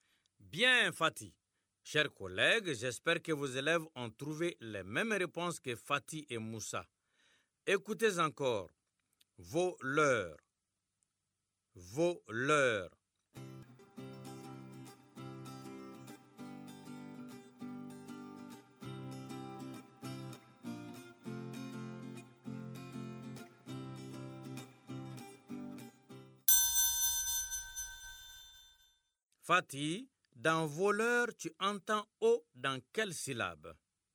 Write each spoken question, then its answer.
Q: Fatih, dans voleur, tu entends O dans quelle syllabe?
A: Monsieur, dans vo, la première syllabe.